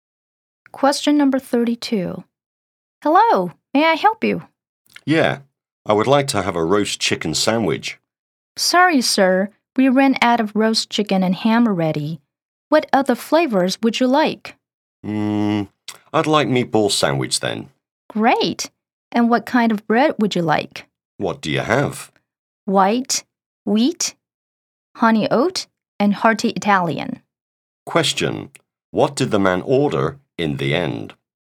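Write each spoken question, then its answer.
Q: Question: What did the man order in the end?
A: A meatball sandwich.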